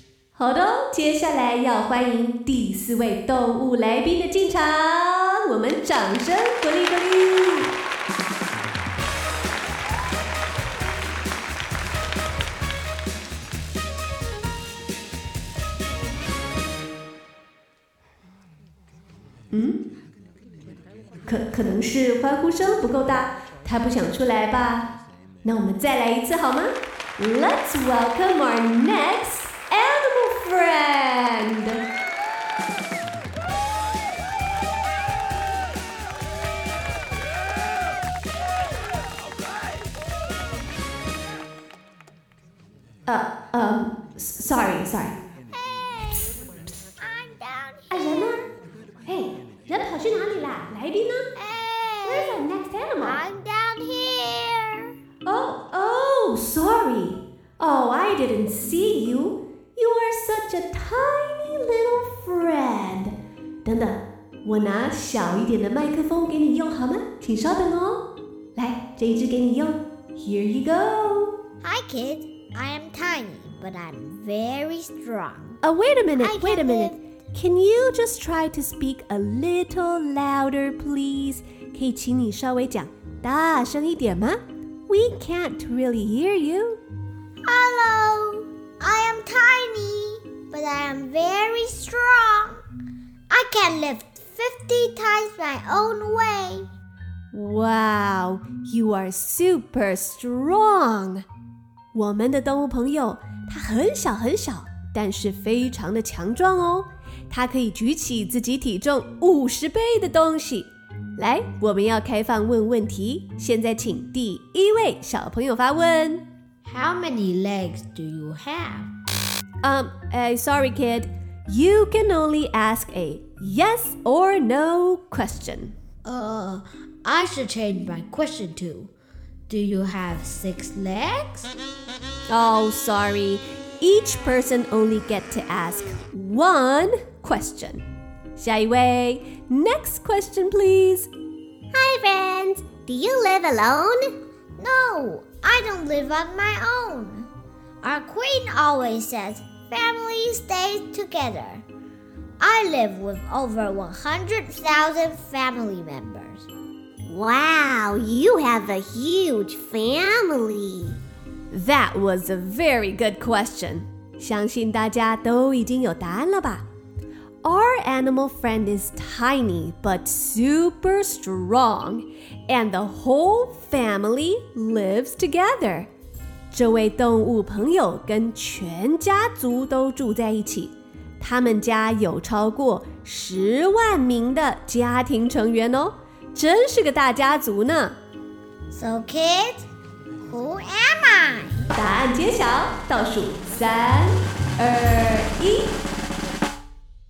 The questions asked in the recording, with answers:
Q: So kids, who am I?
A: Yes, I am an ant. A-N-T, ant.